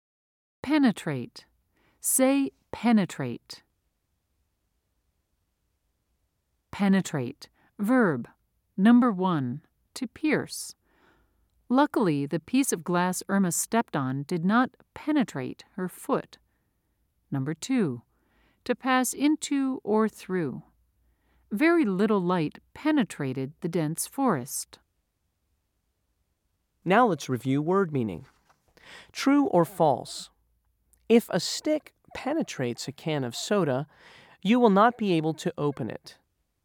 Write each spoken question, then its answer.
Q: True or false? If a stick penetrates a can of soda, you will not be able to open it.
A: If you said false, you're right.